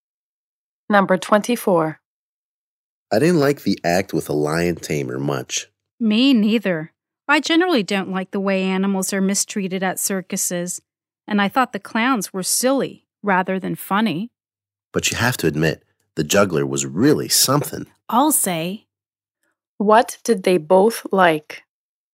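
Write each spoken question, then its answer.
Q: What did they both like?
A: The juggler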